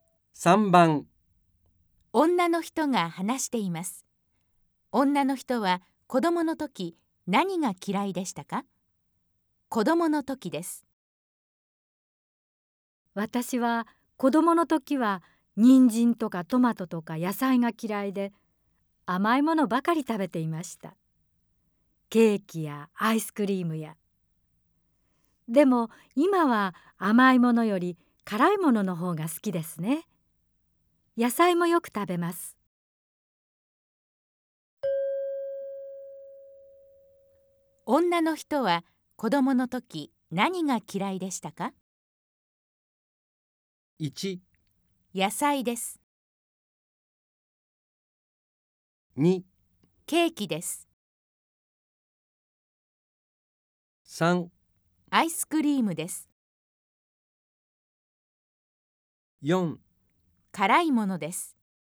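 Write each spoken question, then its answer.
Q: 女の人は子供の時何が嫌いでしたか?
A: 1: 野菜です。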